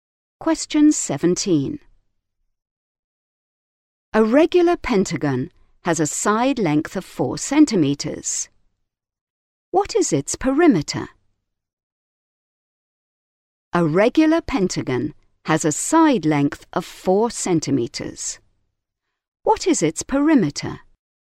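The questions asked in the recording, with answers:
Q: What is its perimeter?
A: 20 centimetres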